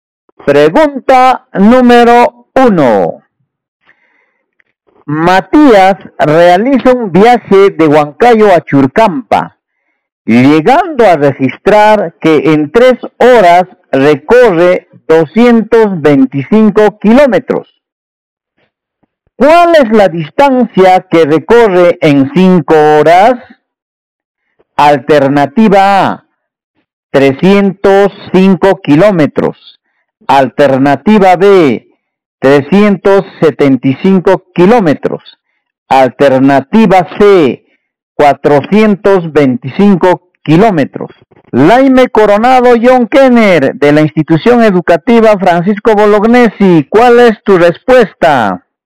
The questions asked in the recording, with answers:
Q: ¿Cuál es la distancia que recorre en 5 horas?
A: La B, 375 kilómetros.